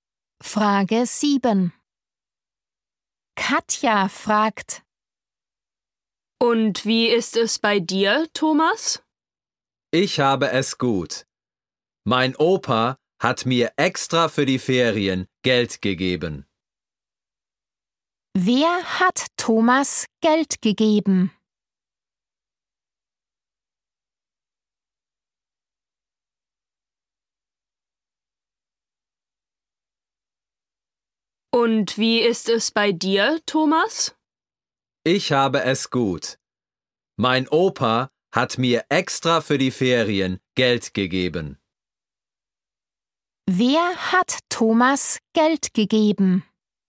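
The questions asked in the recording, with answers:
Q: Wer hat Thomas Geld gegeben?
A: Sein Opa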